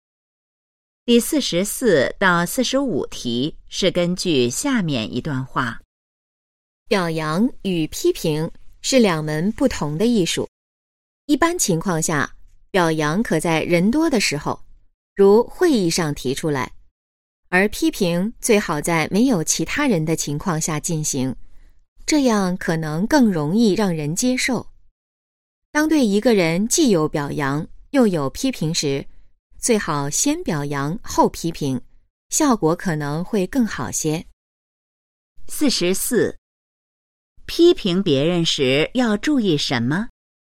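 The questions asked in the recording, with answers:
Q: 批评别人时要注意什么?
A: 最好在没有其他人的情况下进行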